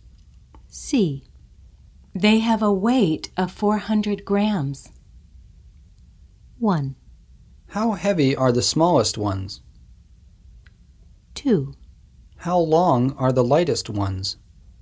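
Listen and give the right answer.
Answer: 1: How heavy are the smallest ones?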